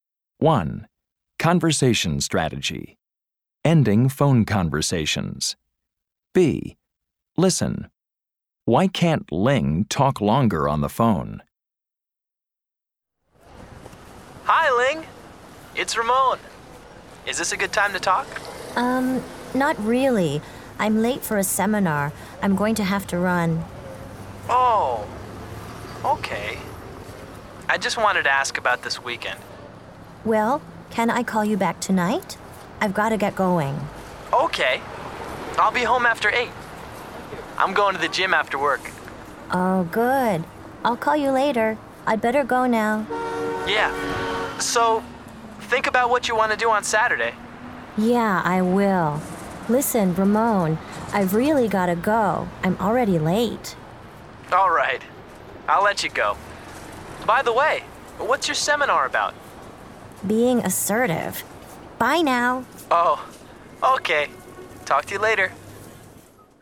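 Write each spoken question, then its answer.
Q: Why can't Ling talk longer on the phone?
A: She's late for a seminar.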